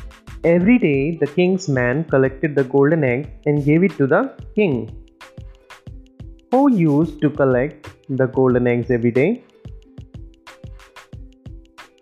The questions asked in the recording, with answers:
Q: who used to collect the golden eggs every day.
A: The king's man. The king's man collected the golden eggs every day and gave it to the king.